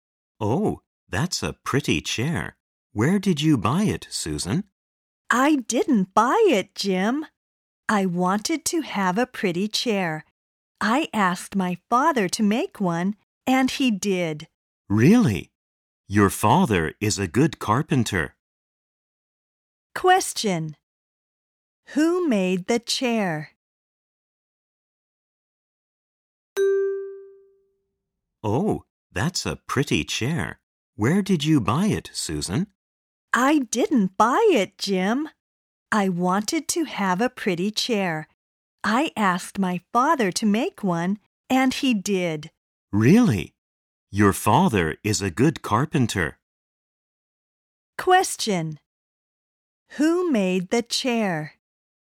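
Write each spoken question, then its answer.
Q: Who made the chair?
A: Susan's father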